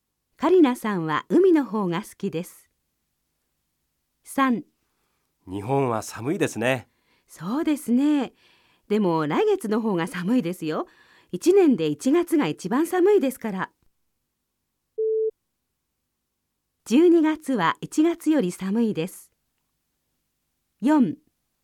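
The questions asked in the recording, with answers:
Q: 12月は1月より寒いです。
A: ×(1月が一番寒い)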